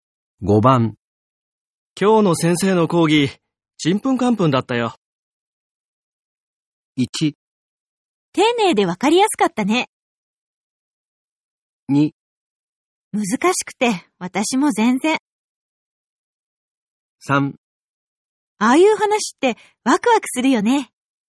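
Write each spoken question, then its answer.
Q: 今日の先生の講義、ちんぷんかんぷんだったよ。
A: 2: 難しくて、私も全然。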